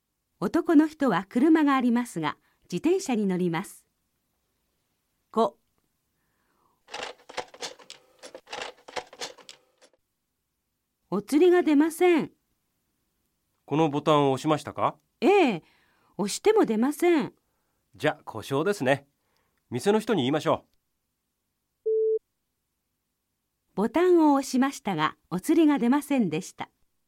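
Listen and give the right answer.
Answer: ○(正しい)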